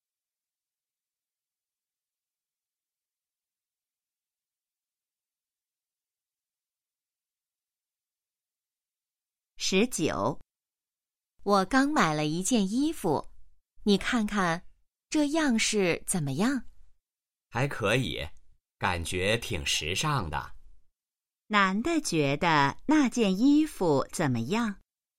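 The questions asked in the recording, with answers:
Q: 男的觉得那件衣服怎么样?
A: 挺时尚的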